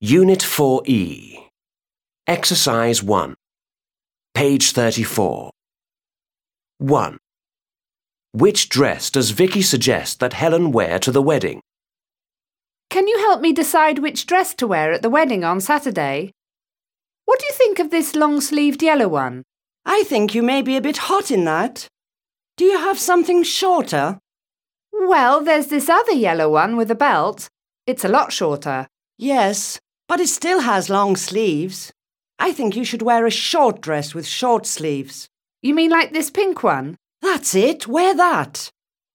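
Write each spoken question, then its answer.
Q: Which dress does Vicky suggest that Helen wear to the wedding?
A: The short pink dress with short sleeves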